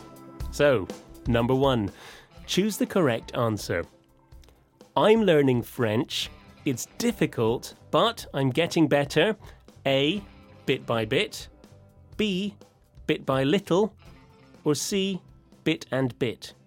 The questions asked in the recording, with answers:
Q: I'm learning French. It's difficult, but I'm getting better.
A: And the answer is A, bit by bit.